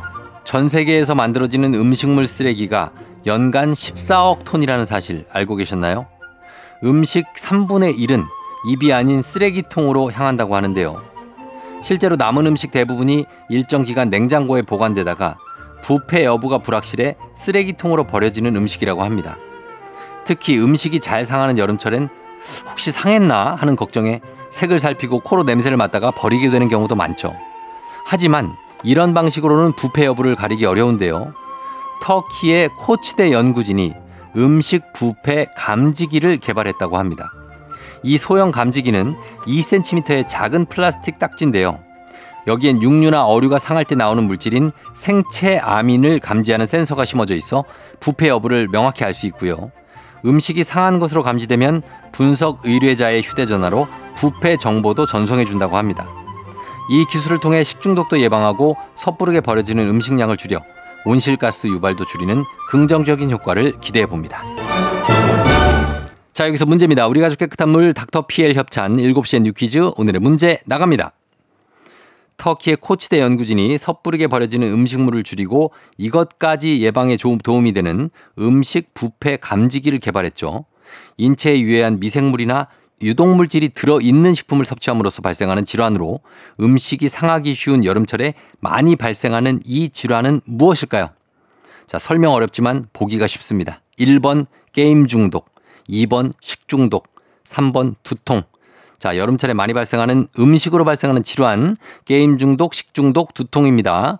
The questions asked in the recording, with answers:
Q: 인체에 유해한 미생물이나 유독물질이 들어있는 식품을 섭취함으로써 발생하는 질환으로 음식이 상하기 쉬운 여름철에 많이 발생하는 이 질환은 무엇일까요?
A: 정답 2번 식중독입니다.